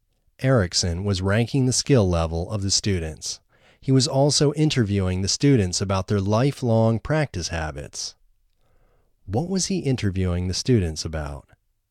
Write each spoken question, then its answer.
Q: What was he interviewing the students about?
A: He was interviewing the students about their lifelong practice habits.